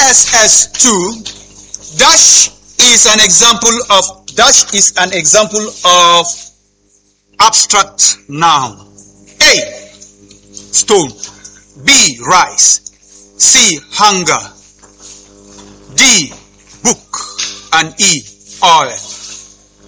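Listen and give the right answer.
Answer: C: hunger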